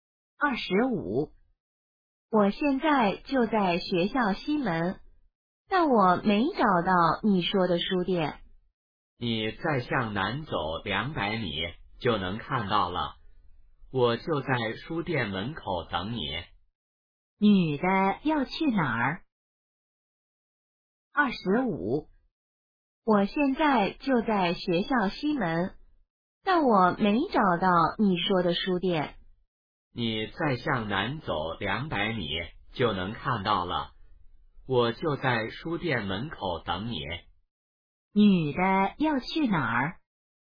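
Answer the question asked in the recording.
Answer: 书店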